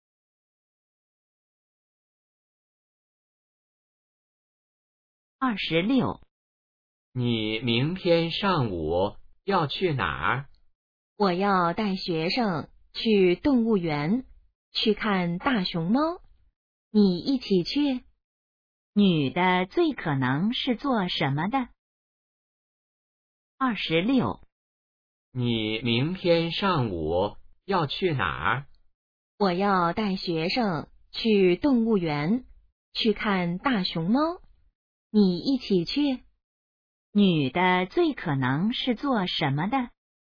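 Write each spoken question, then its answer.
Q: 女的最可能是做什么的?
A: 老师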